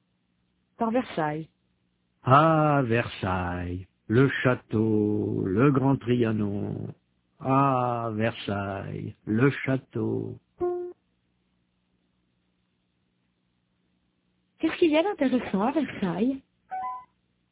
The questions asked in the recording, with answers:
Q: Qu'est-ce qu'il y a d'intéressant à Versailles ?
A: Le château.